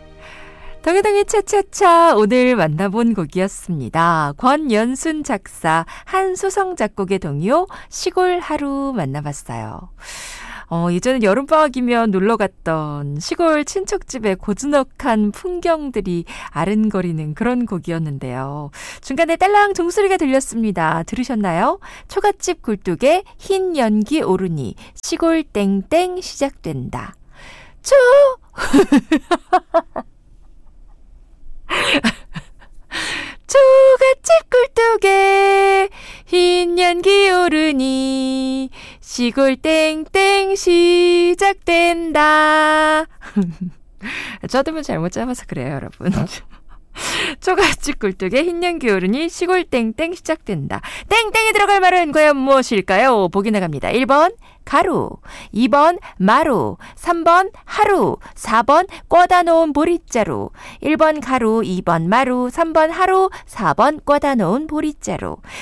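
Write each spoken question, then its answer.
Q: 땡땡이 들어갈 말은 과연 무엇일까요?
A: 3: 하루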